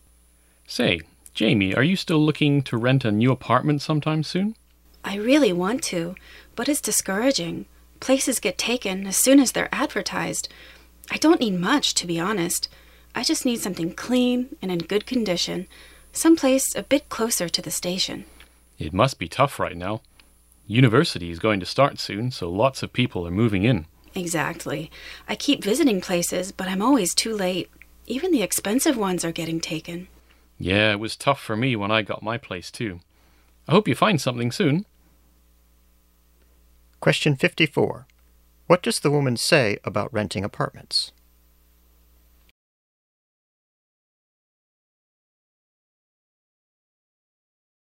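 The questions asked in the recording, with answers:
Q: What does the woman say about renting apartments?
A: Apartments get taken as soon as they're advertised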